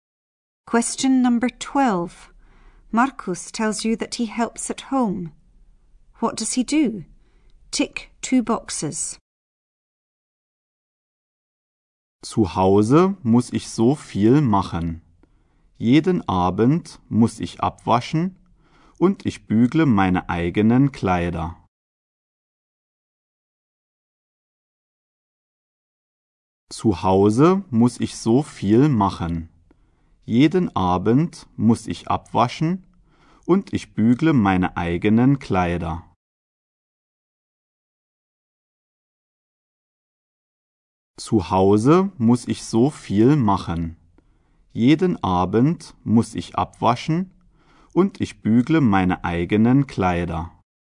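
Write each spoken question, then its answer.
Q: What does he do? Tick 2 boxes.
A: Washes the dishes and irons his own clothes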